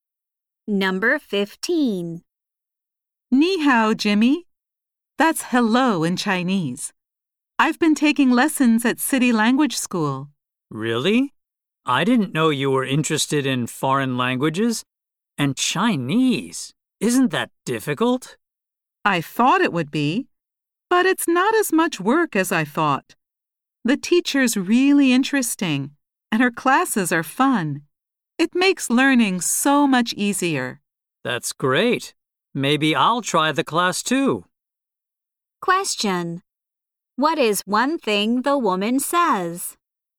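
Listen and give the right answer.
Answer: Learning Chinese is less work than she expected.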